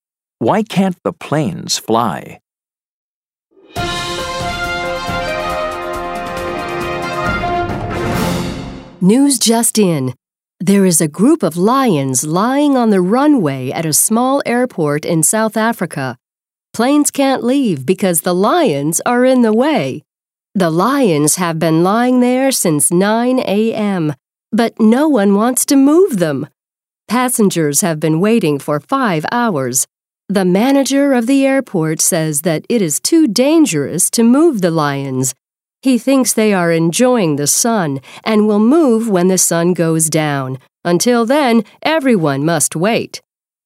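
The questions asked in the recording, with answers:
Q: Why can't the planes fly?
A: Because a group of lions is lying on the runway.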